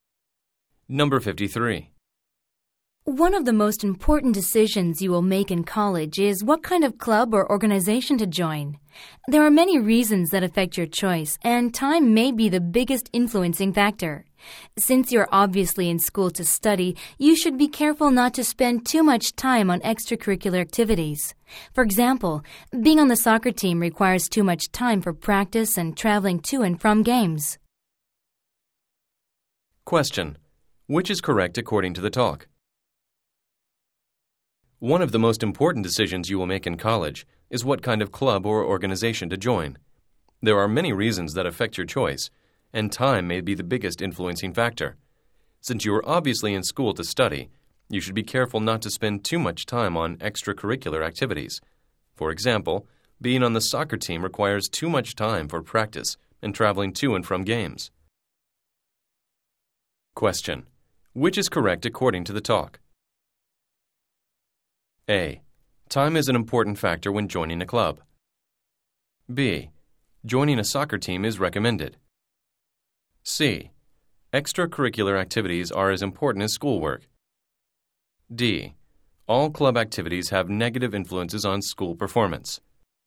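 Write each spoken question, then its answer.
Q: Which is correct according to the talk?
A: A: Time is an important factor when joining a club.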